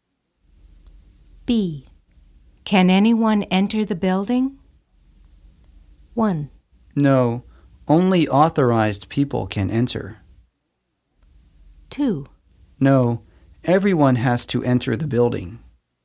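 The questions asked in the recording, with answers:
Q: Can anyone enter the building?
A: 1: No, only authorized people can enter.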